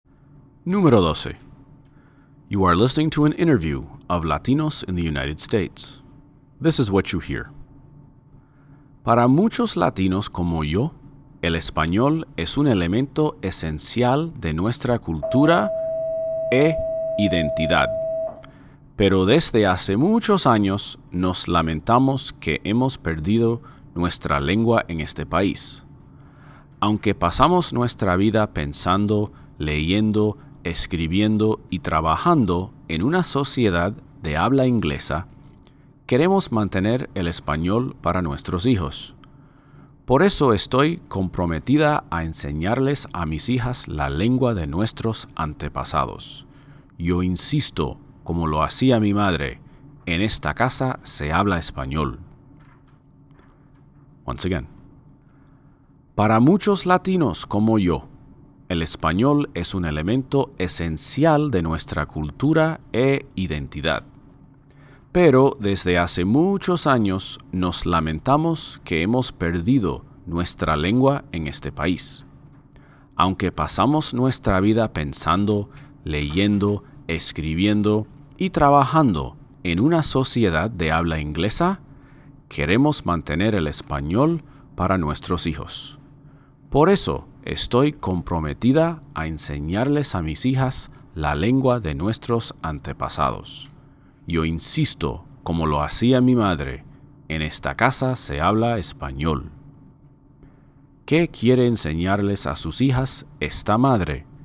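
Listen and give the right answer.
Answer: La lengua de sus antepasados: el español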